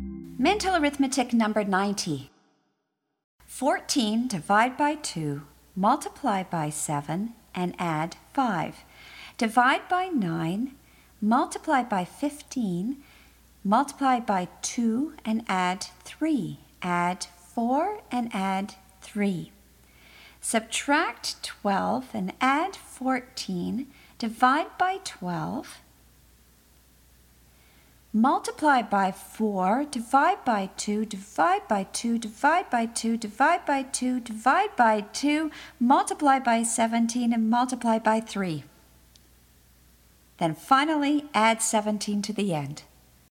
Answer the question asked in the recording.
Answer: And the answer is 119.